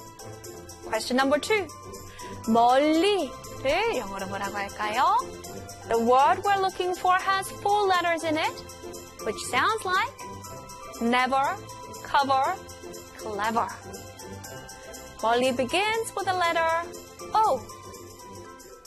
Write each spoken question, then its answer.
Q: 멀리를 영어로 뭐라고 할까요?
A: 멀리 in English is O-V-E-R, over.